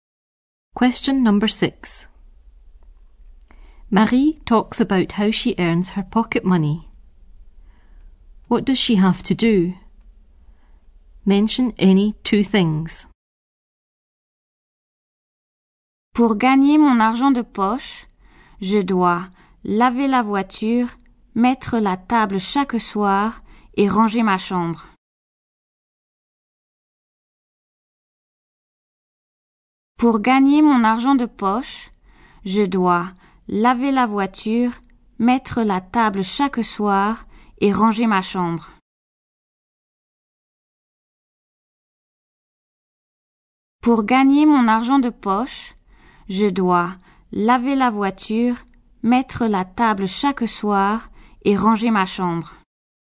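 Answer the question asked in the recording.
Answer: Wash the car; set the table every evening; tidy her room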